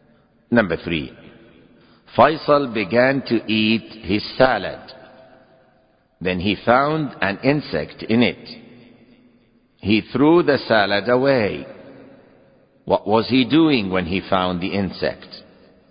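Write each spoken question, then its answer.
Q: What was he doing when he found the insect?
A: He was eating his salad.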